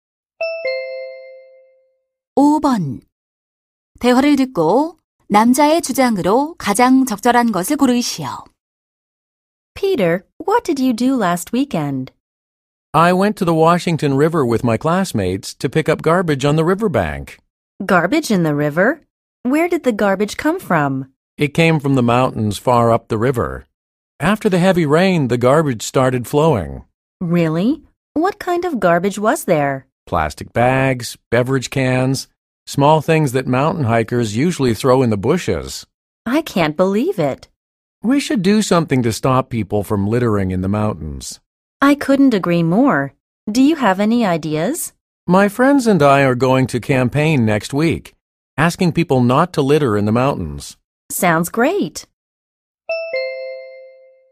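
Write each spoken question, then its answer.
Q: 대화를 듣고 남자의 주장으로 가장 적절한 것을 고르시오.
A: 산에 쓰레기를 버리지 말아야 한다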